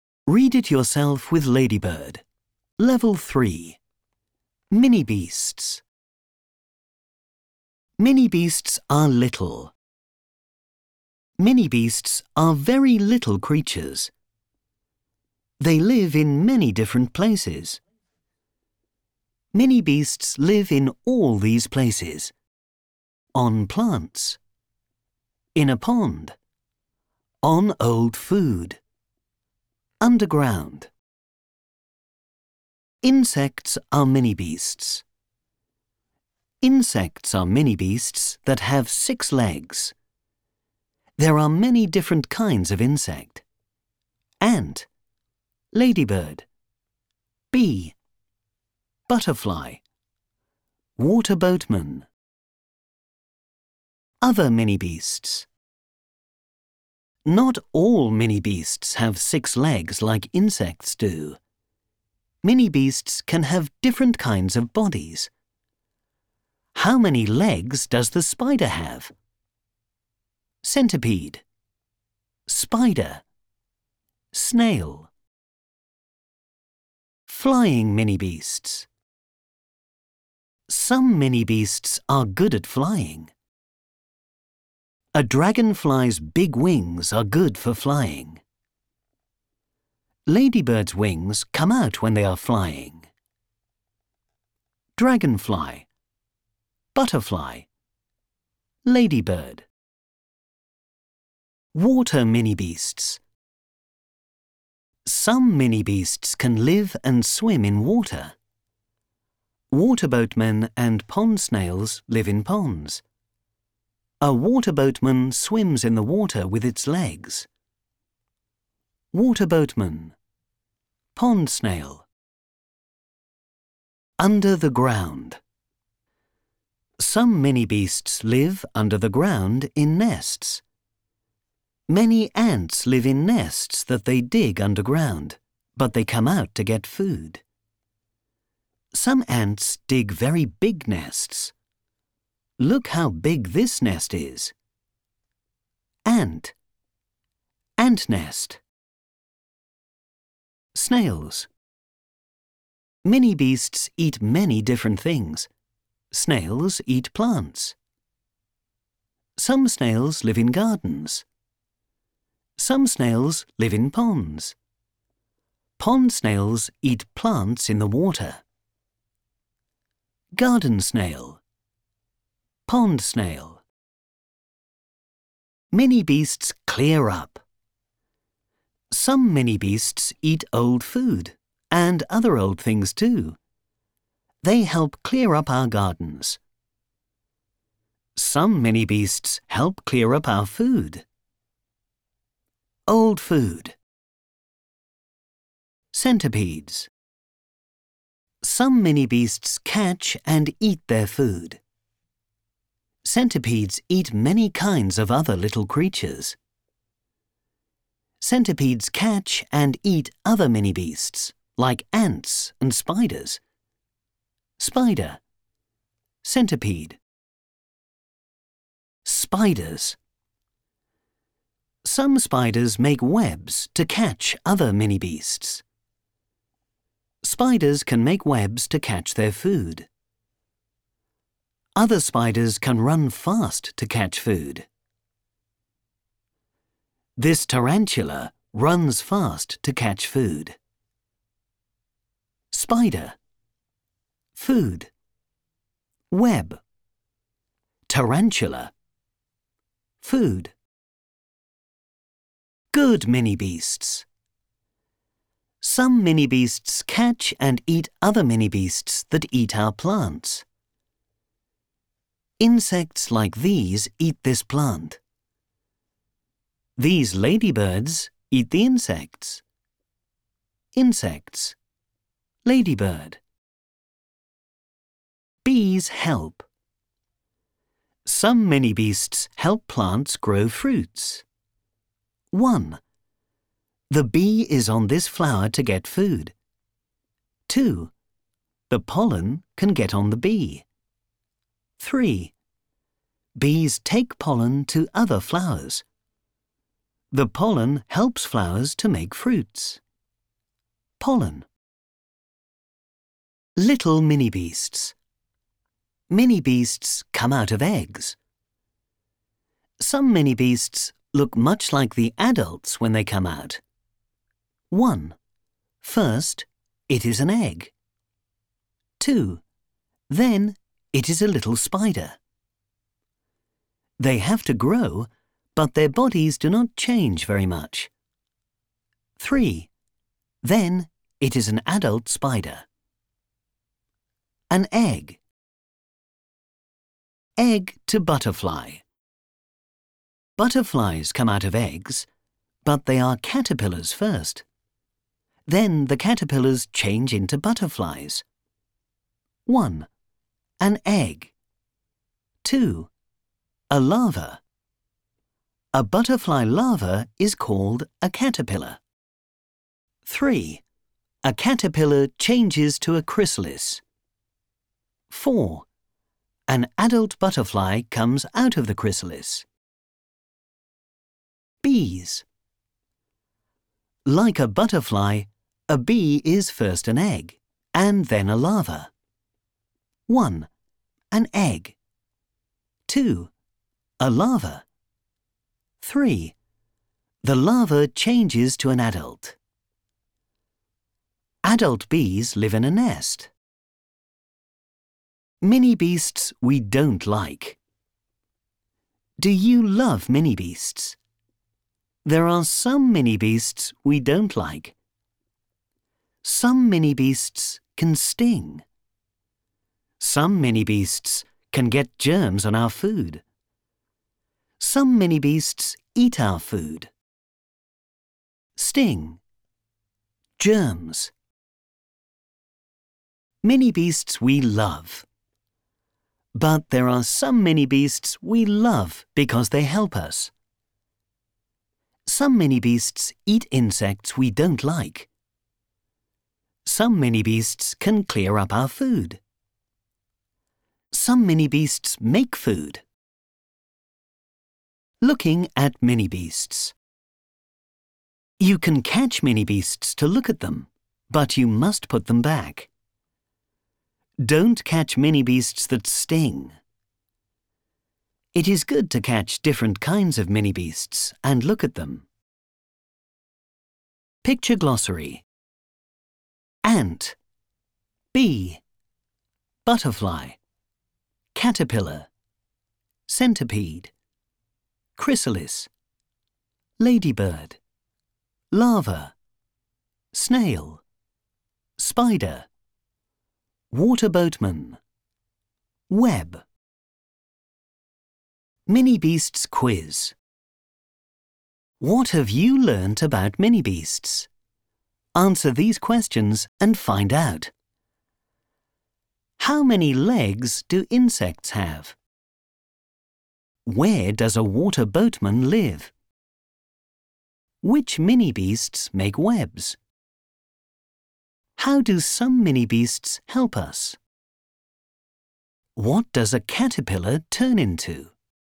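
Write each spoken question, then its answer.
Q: How many legs do insects have?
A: six

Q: Where does a water boatman live?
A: in ponds

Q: Which mini-beasts make webs?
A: spiders

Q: How do some mini-beasts help us?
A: they eat insects we don't like, clear up our food and gardens, and make food

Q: What does a caterpillar turn into?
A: a butterfly (first a chrysalis)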